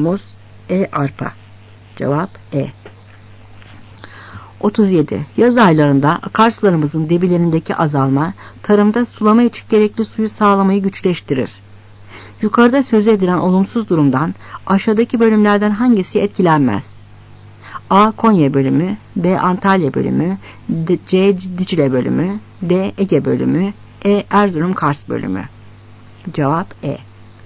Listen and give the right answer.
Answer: Cevap E.